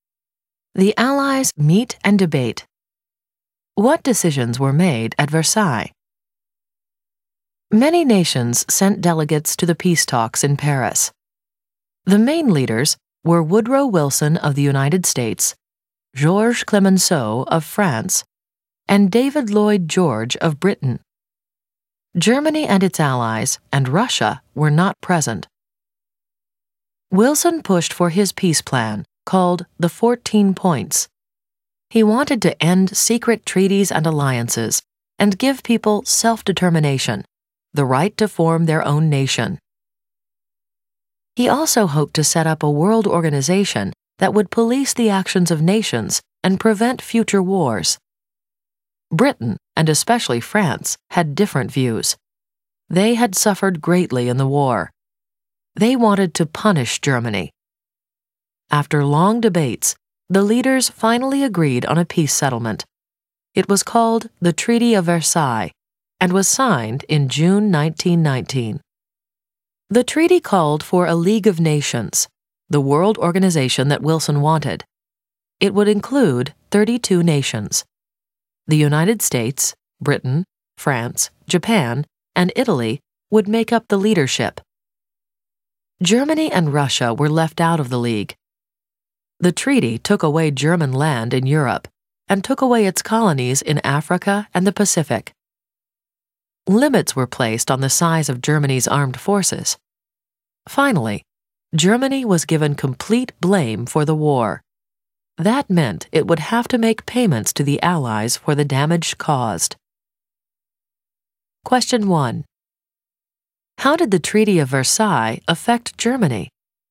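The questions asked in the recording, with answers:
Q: How did the Treaty of Versailles affect Germany?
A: It lost land in Europe and its colonies, had its armed forces limited, got all the blame for the war, and had to pay the Allies for war damage.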